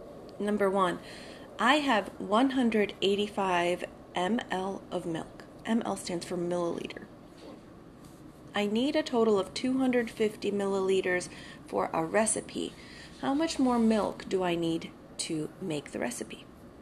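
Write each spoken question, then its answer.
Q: How much more milk do I need to make the recipe?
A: 65 milliliters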